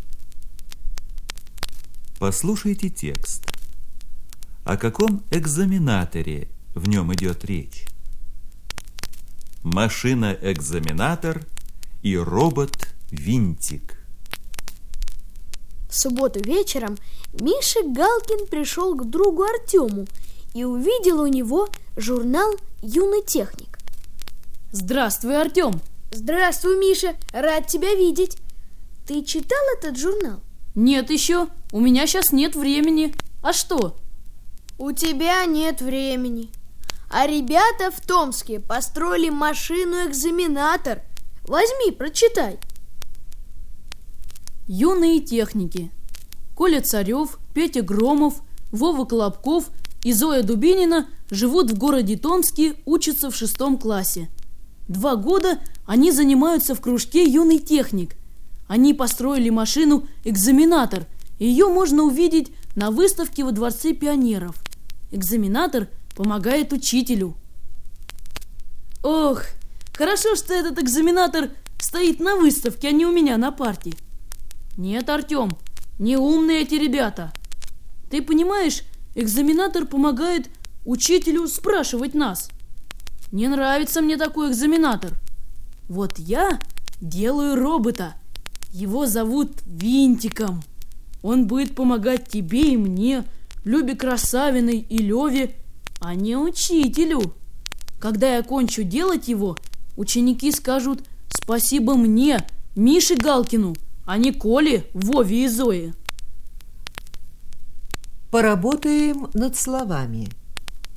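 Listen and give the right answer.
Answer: О машине-экзаменаторе, которую построили юные техники из Томска; она помогает учителю спрашивать учеников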